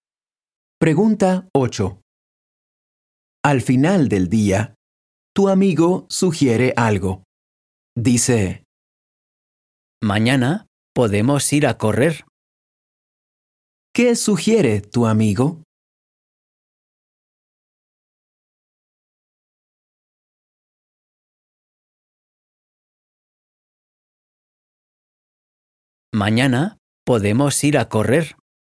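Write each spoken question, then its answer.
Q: ¿Qué sugiere tu amigo?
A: Ir a correr mañana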